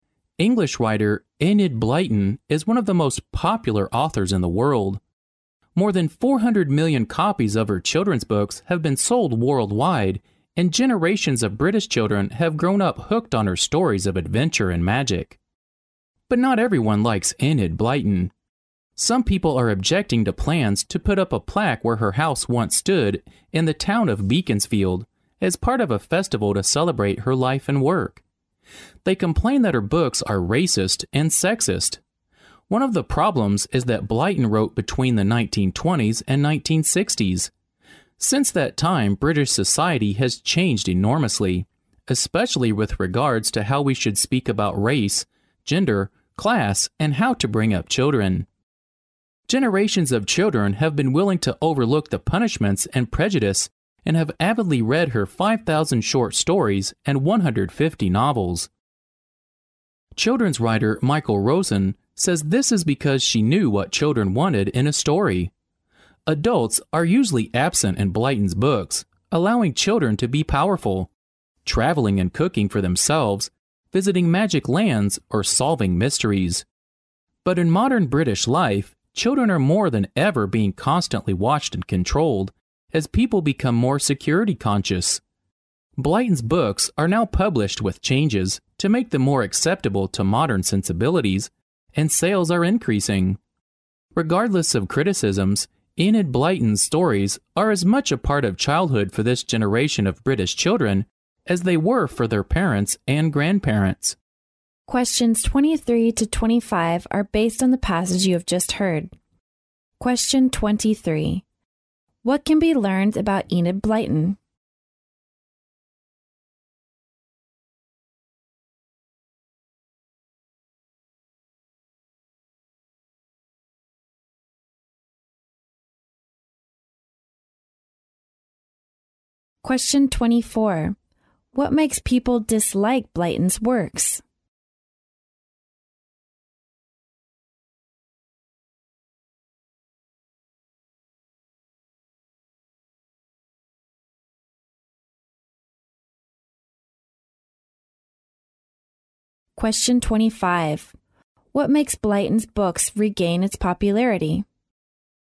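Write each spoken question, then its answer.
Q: What can be learned about Enid Blyton?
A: She is one of the most popular children's authors in the world

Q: What makes people dislike Blyton's works?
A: People think her books are racist and sexist

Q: What makes Blyton's books regain its popularity?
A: They are now published with changes to suit modern sensibilities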